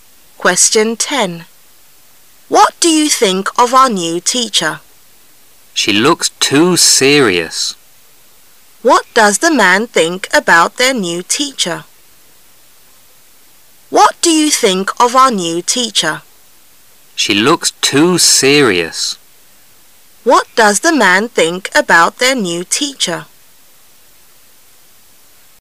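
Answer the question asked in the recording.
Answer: She looks too serious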